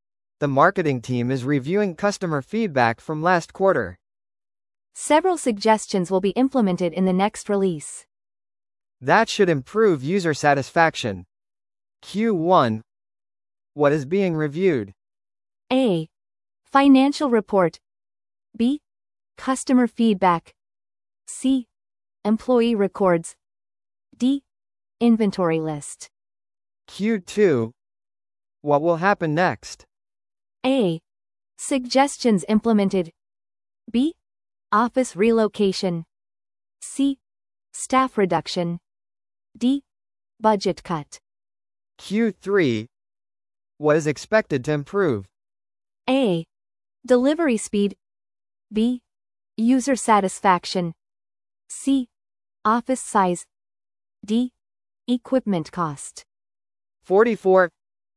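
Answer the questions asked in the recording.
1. B: Customer feedback.
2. A: Suggestions implemented.
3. B: User satisfaction.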